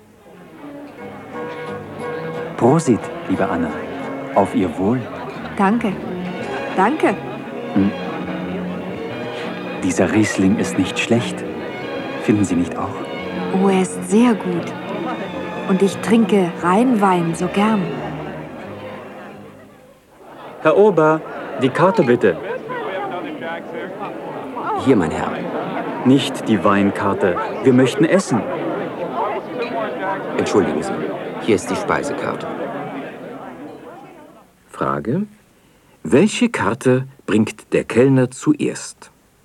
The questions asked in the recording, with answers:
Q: Welche Karte bringt der Kellner zuerst?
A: Er bringt zuerst die Weinkarte.